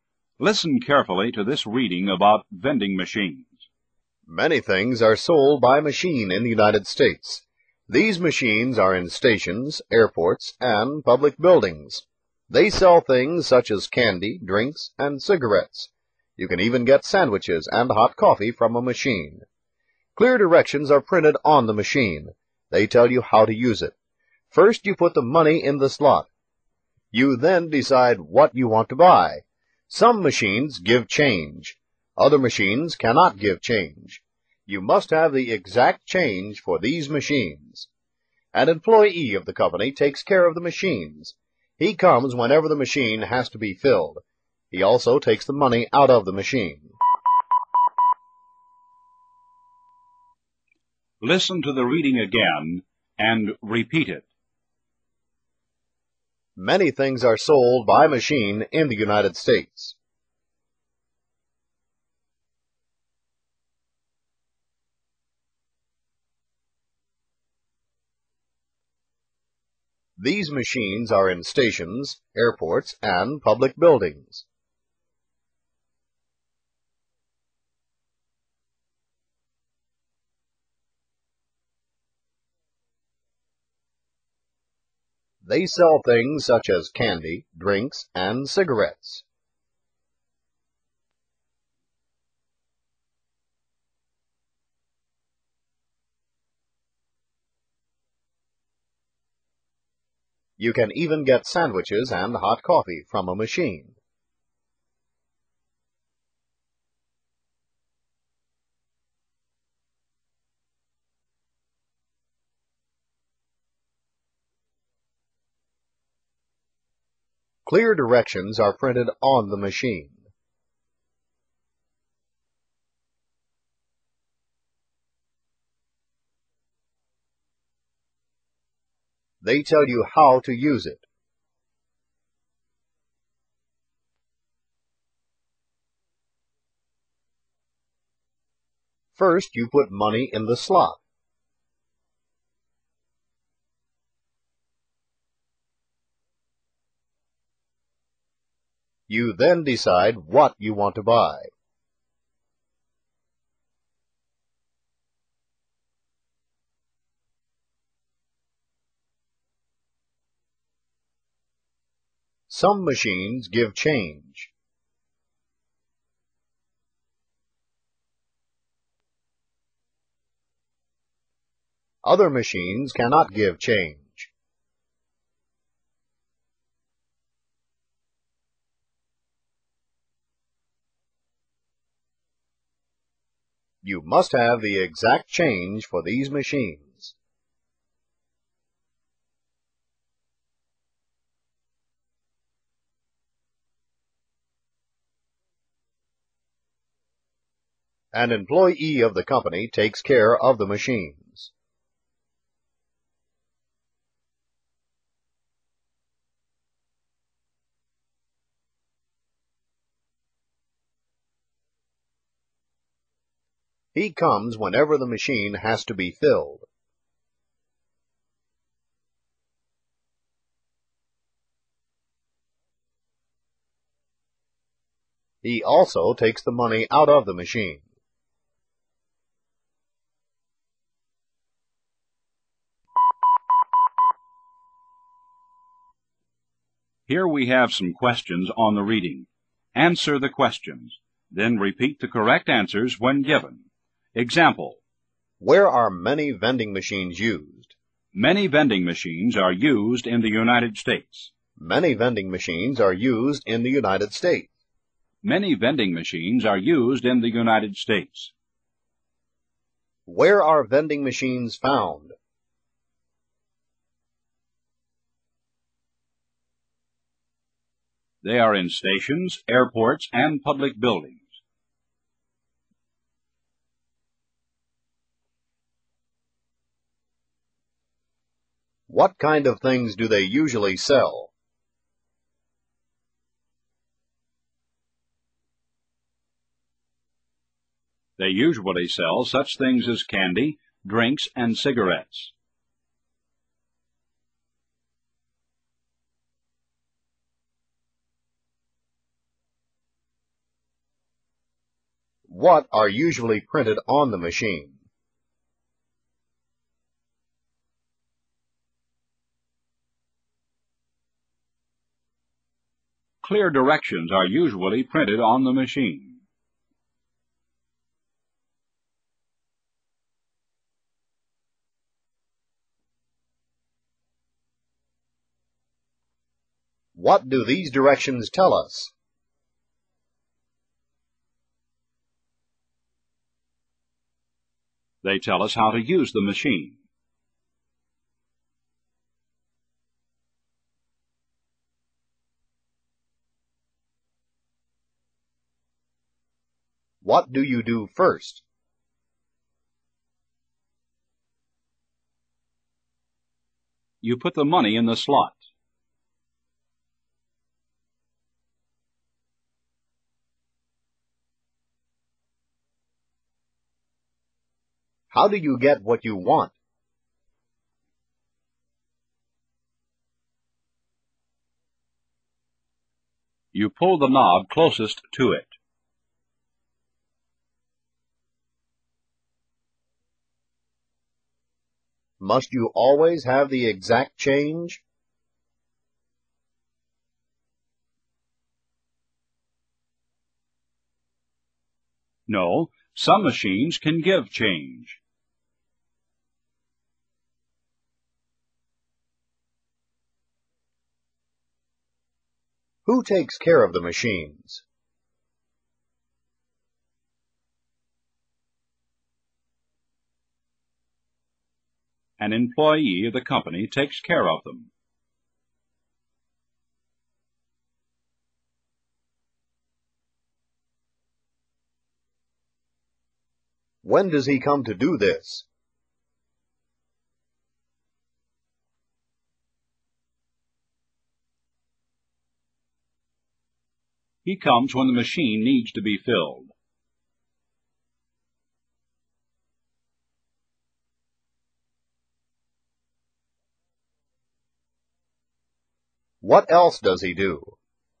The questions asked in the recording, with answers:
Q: Where are vending machines found?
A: They are in stations, airports, and public buildings.

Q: What kind of things do they usually sell?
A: They usually sell such things as candy, drinks, and cigarettes.

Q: What are usually printed on the machine?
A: Clear directions are usually printed on the machine.

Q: What do these directions tell us?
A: They tell us how to use the machine.

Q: What do you do first?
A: You put the money in the slot.

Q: Must you always have the exact change?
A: No, some machines can give change.

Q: Who takes care of the machines?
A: An employee of the company takes care of them.

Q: When does he come to do this?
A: He comes when the machine needs to be filled.

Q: What else does he do?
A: He takes the money out of the machine.